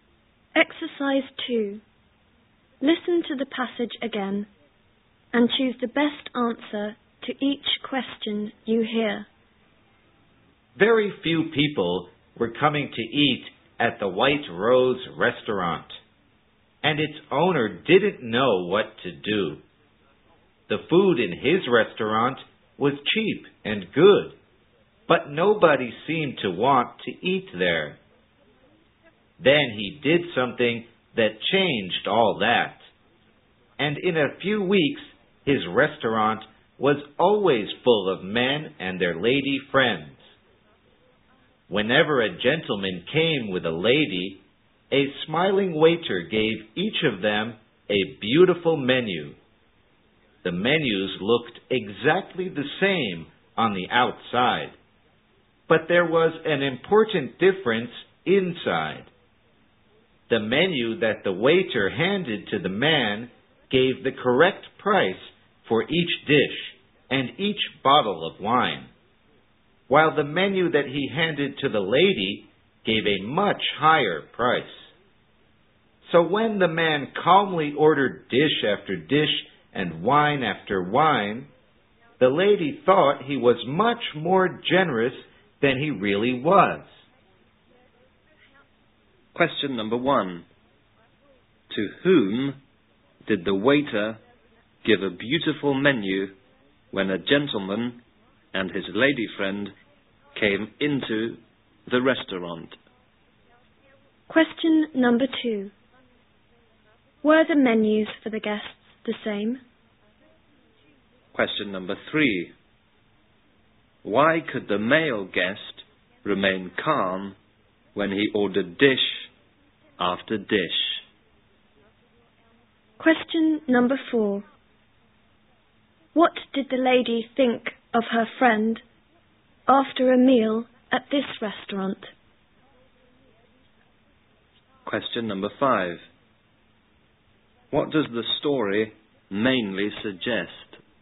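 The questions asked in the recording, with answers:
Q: To whom did the waiter give a beautiful menu when a gentleman and his lady friend came into the restaurant?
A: To each of them, the man and the lady

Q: Were the menus for the guests the same?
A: No; they looked the same outside, but the lady's showed much higher prices

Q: Why could the male guest remain calm when he ordered dish after dish?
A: Because his menu showed the correct, lower prices

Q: What did the lady think of her friend after a meal at this restaurant?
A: That he was much more generous than he really was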